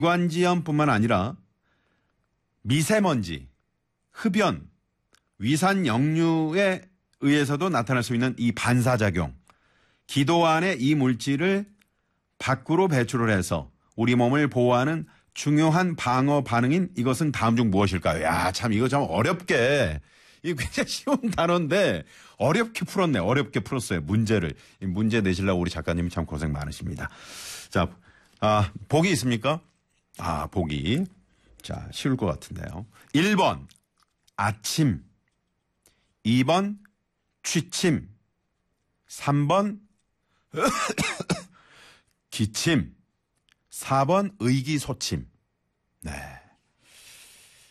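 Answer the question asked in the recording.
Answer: 3번: 기침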